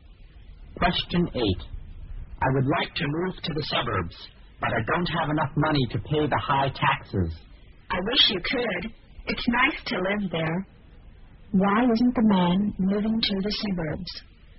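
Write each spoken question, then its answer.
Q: Why isn't the man moving to the suburbs?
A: He doesn't have enough money to pay the high taxes.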